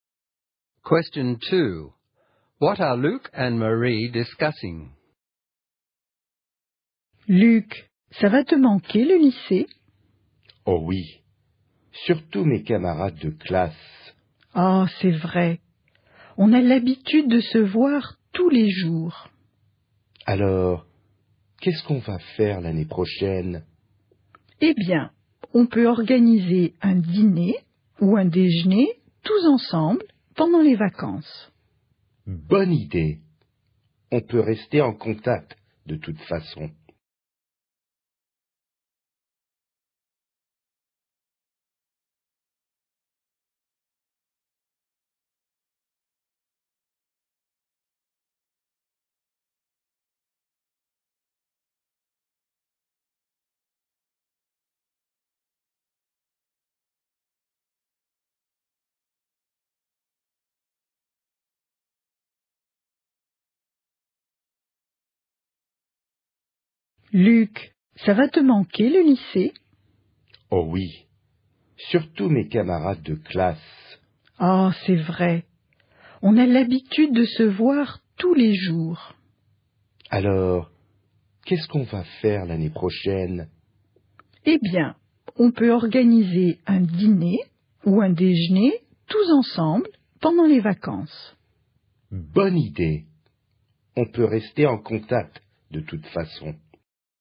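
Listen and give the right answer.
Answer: Missing school and classmates, and how to stay in touch next year (a dinner or lunch together in the holidays)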